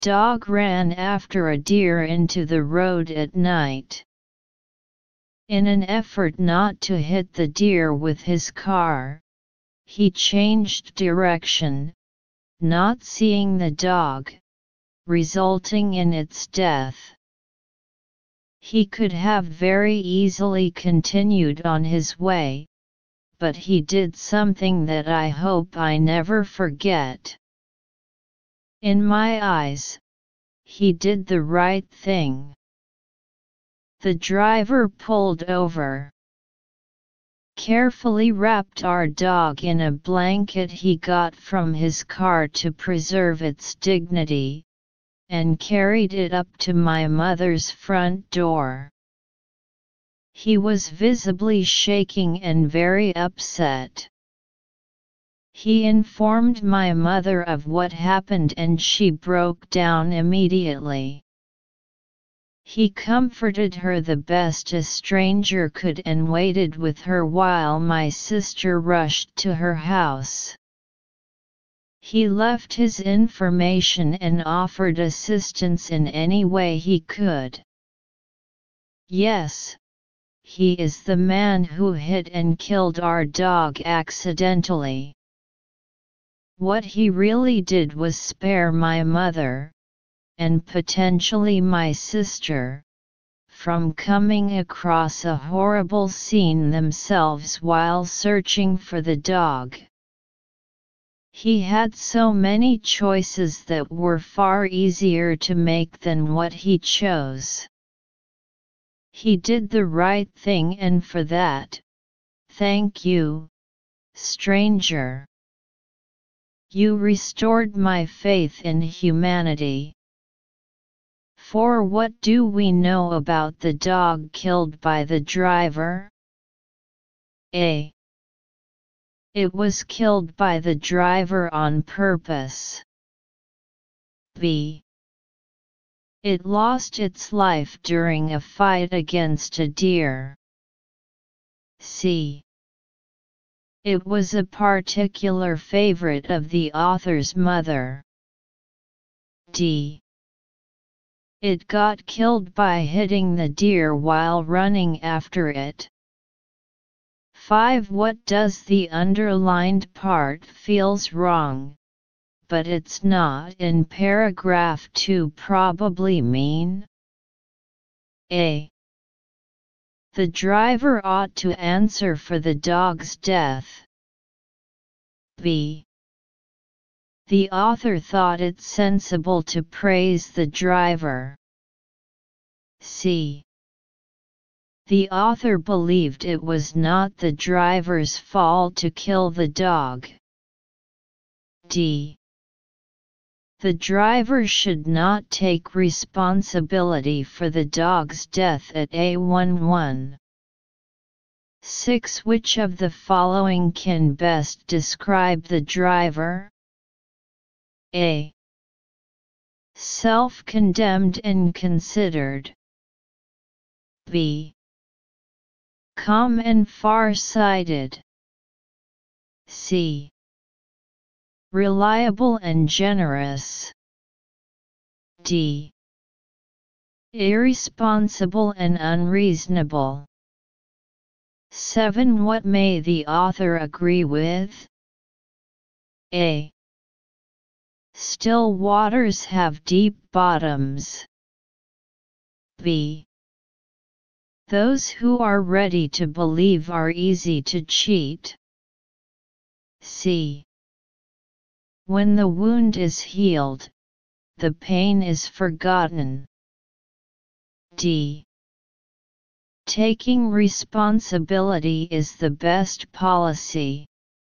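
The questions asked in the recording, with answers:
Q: Which of the following can best describe the driver?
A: A: Self-condemned and considered.

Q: What may the author agree with?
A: D: Taking responsibility is the best policy.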